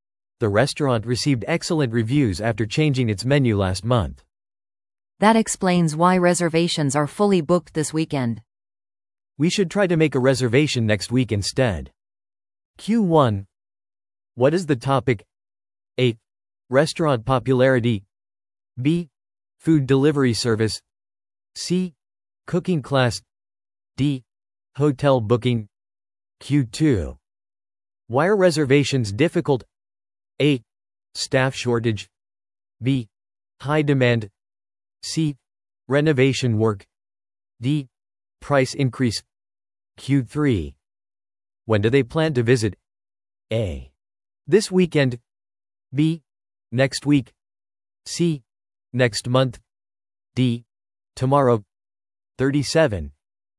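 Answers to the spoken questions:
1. A: Restaurant popularity.
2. B: High demand.
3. B: Next week.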